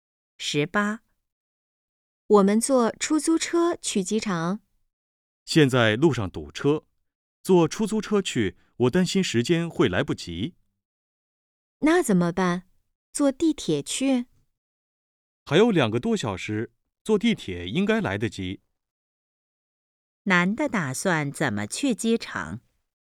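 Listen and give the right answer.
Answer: 坐地铁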